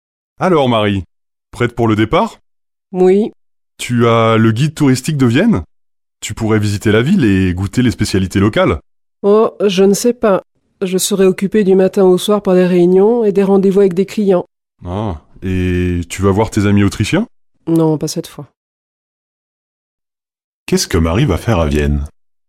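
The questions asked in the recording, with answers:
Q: Qu'est-ce que Marie va faire à Vienne?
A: Travailler (réunions et rendez-vous avec des clients).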